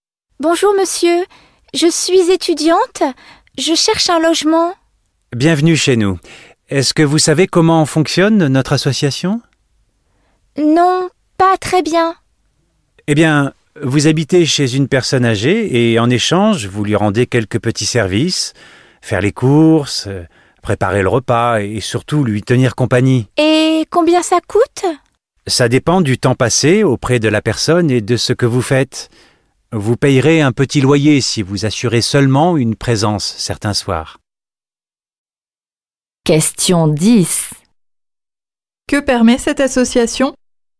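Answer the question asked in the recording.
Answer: De loger chez une personne âgée en échange de petits services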